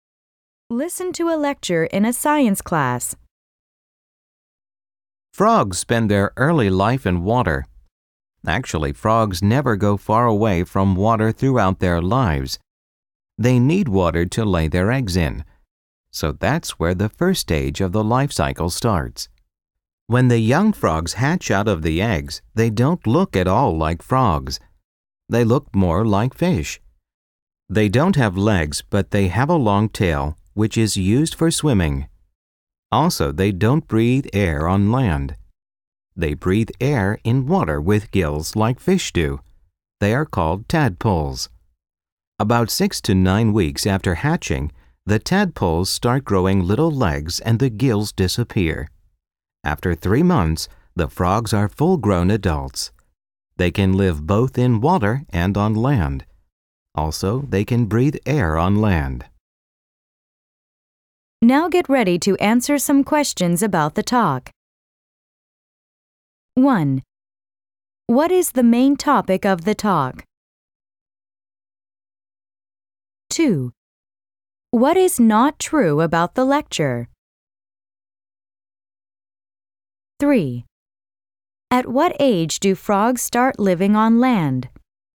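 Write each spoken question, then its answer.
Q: What is the main topic of the talk?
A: The life cycle of frogs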